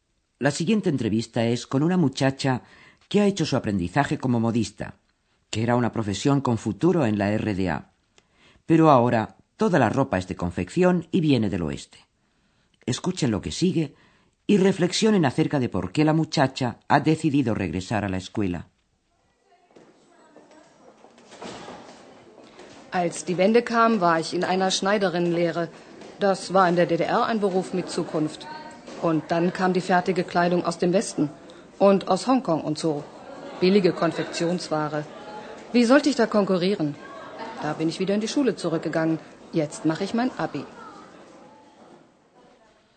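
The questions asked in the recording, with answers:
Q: reflexionen acerca de por qué la muchacha ha decidido regresar a la escuela.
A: Porque no podía competir con la ropa de confección barata del oeste y de Hong Kong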